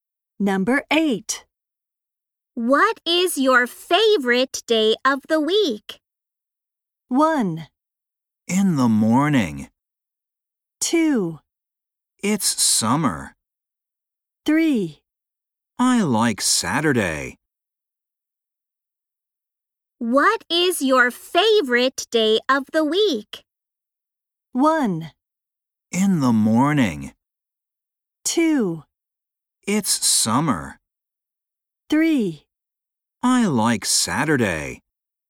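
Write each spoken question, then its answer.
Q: What is your favorite day of the week?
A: 3: I like Saturday.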